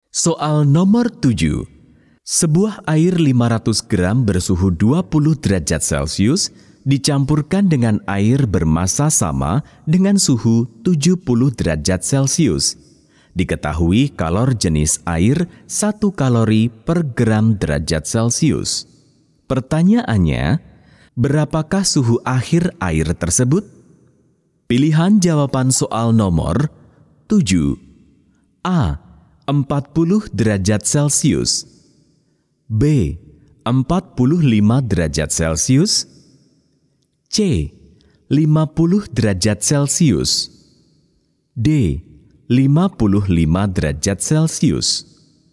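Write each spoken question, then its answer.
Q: Pertanyaannya, berapakah suhu akhir air tersebut?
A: B: 45 derajat Celcius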